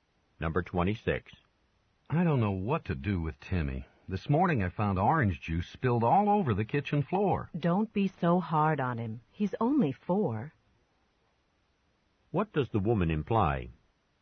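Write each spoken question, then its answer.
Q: What does the woman imply?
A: Timmy is too young to be blamed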